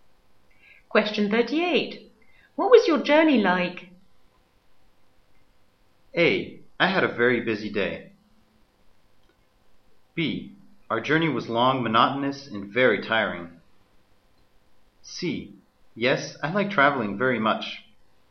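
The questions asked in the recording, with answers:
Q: What was your journey like?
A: B: Our journey was long, monotonous, and very tiring.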